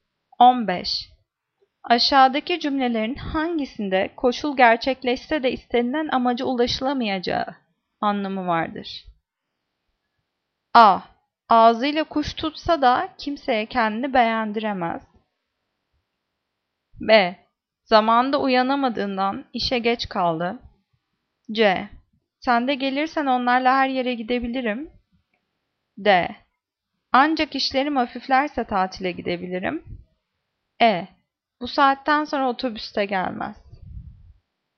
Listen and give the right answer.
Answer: Cevap A. Ağzıyla kuş tutsa da kimseye kendini beğendiremez.